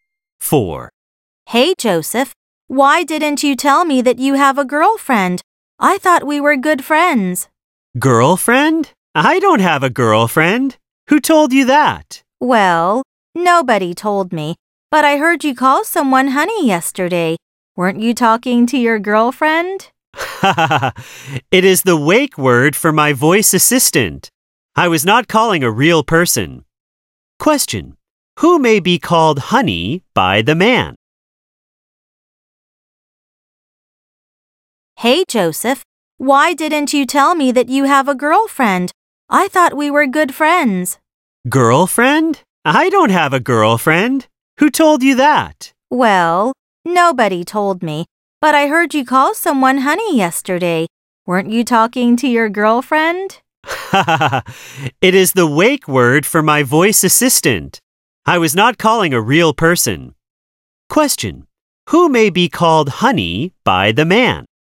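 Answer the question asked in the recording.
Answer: His voice assistant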